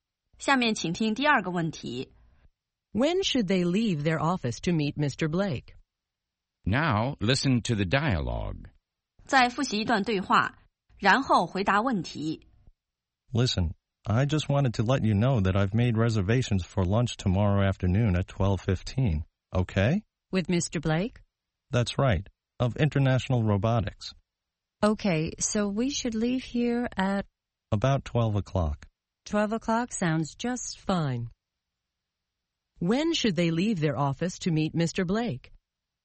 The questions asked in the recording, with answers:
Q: When should they leave their office to meet Mr. Blake?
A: They should leave their office at 12 o'clock.